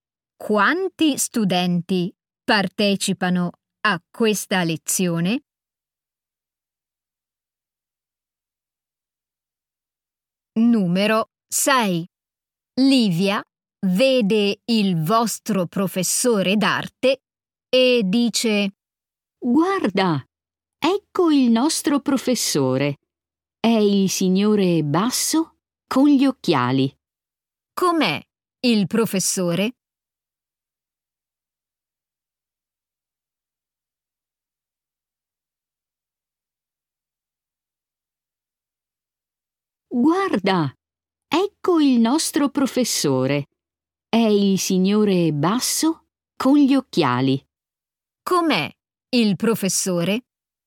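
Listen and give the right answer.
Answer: Basso con gli occhiali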